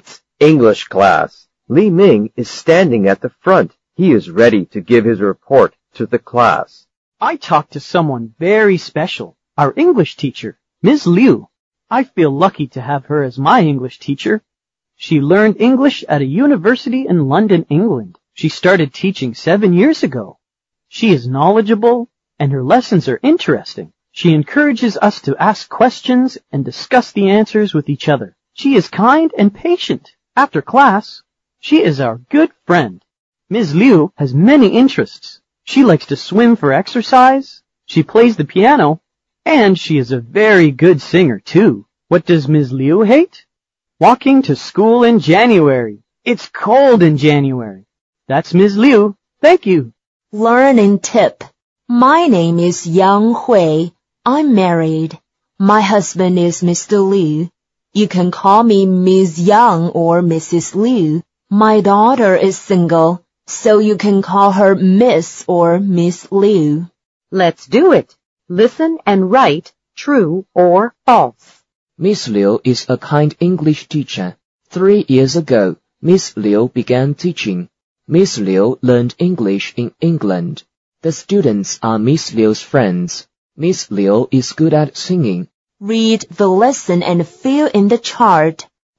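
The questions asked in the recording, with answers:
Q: Miss Liu is a kind English teacher.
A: True

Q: 3 years ago, Miss Liu began teaching.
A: False

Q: Miss Liu learned English in England.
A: True

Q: Miss Liu is good at singing.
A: True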